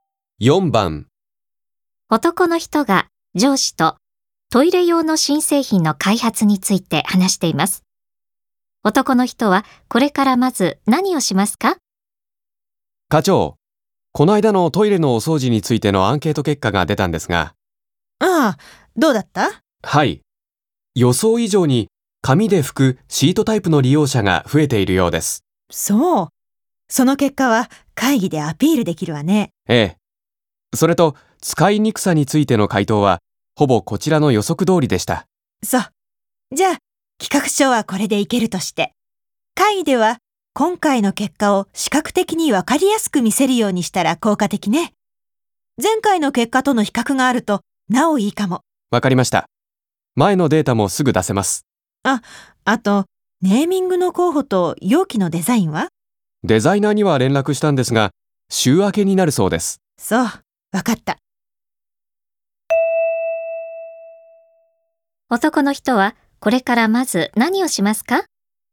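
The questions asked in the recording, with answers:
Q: 男の人はこれからまず何をしますか?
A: アンケート結果を前回の結果と比較して、視覚的に分かりやすい資料にする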